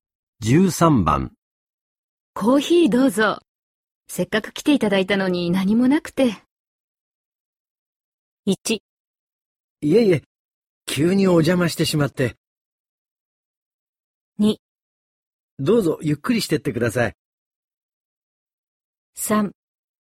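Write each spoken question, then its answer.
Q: コーヒーどうぞ。せっかく来ていただいたのに何もなくて。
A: 1: いえいえ、急にお邪魔してしまって。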